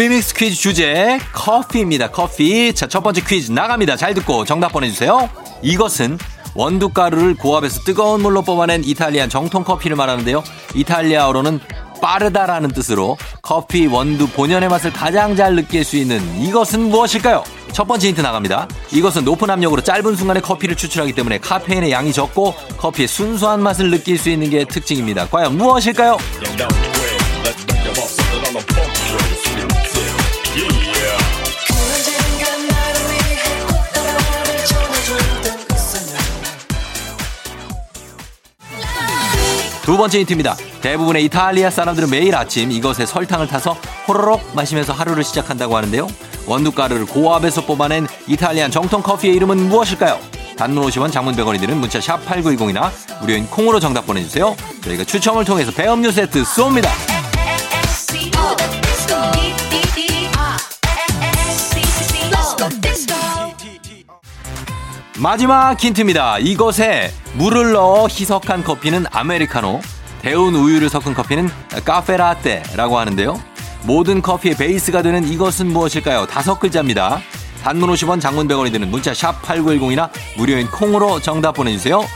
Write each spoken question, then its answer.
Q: 이탈리아어로는 빠르다라는 뜻으로 커피 원두 본연의 맛을 가장 잘 느낄 수 있는 이것은 무엇일까요?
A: 에스프레소였습니다.